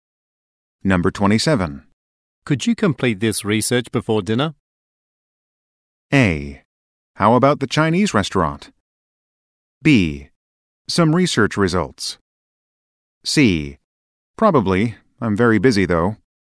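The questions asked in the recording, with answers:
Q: Could you complete this research before dinner?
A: C: Probably. I'm very busy, though.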